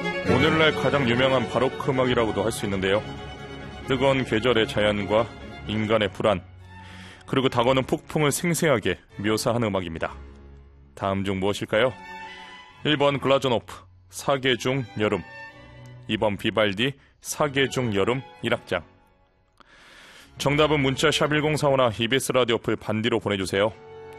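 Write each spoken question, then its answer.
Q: 다음 중 무엇일까요?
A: 2번: 비발디, 사계 중 여름 1악장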